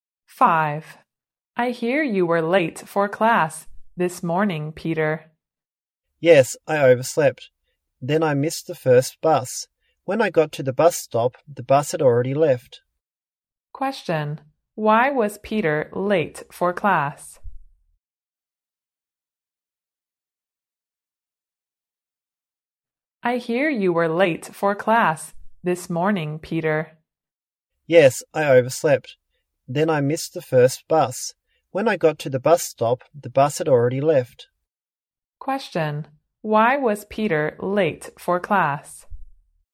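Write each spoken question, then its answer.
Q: Why was Peter late for class?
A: He overslept and missed the first bus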